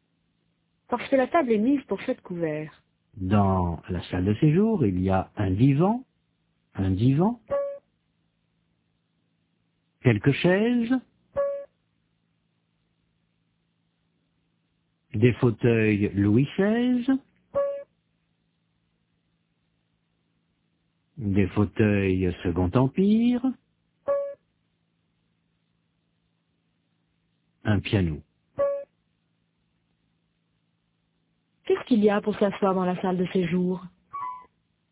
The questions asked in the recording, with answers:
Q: Qu'est-ce qu'il y a pour s'asseoir dans la salle de séjour?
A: Un divan, quelques chaises, des fauteuils.